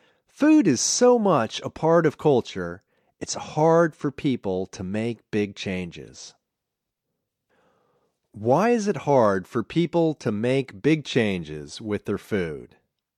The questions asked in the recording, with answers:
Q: Why is it hard for people to make big changes with their food?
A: Food is so much a part of culture.